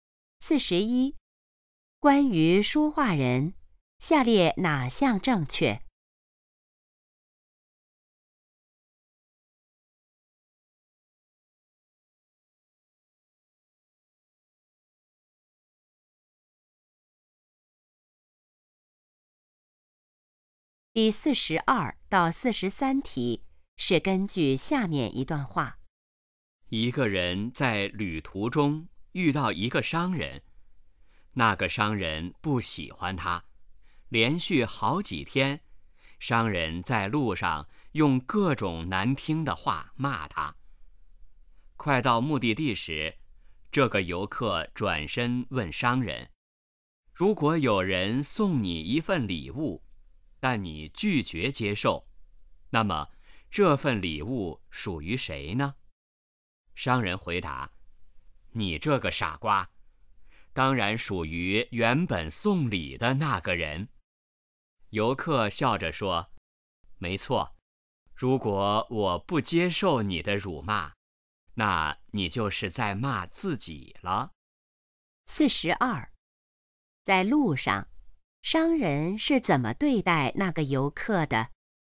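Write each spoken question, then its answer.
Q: 在路上商人是怎么对待那个游客的?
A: 用各种难听的话骂他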